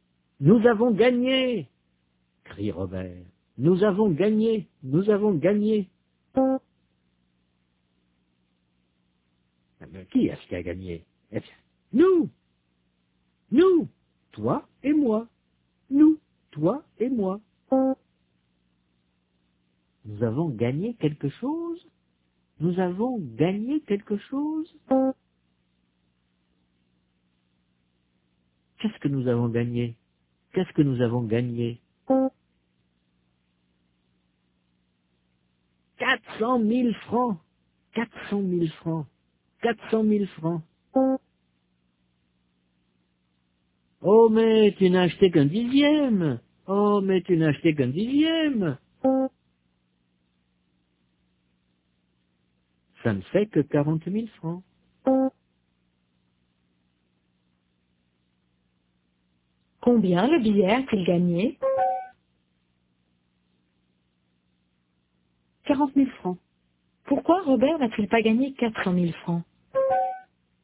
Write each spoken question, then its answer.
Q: Pourquoi Robert n'a-t-il pas gagné 400 000 francs?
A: Parce qu'il n'a acheté qu'un dixième.